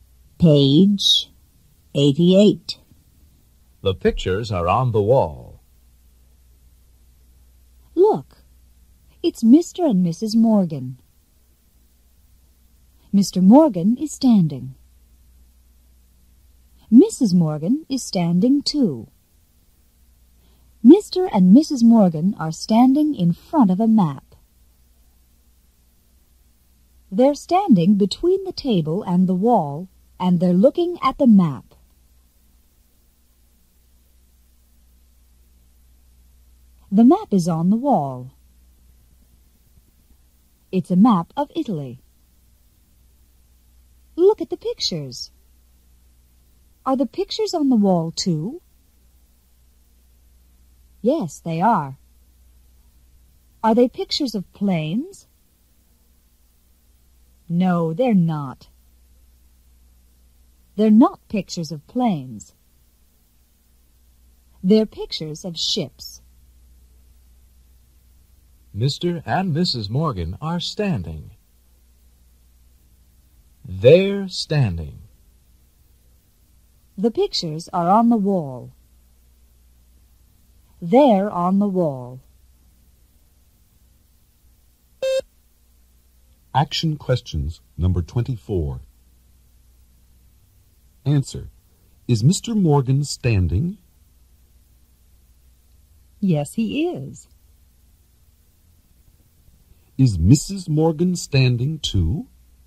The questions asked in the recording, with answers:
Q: Is Mrs. Morgan standing too?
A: Yes, she is.